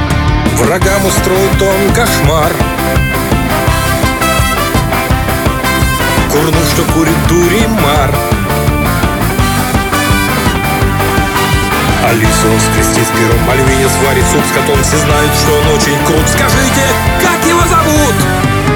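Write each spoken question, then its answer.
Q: Скажите, как его зовут?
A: Буратино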